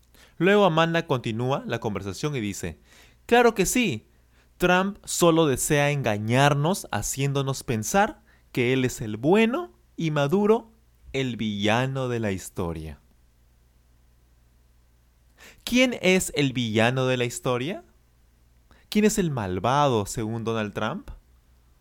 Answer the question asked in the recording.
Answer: Nicolás Maduro. Nicolás Maduro es el villano de la historia.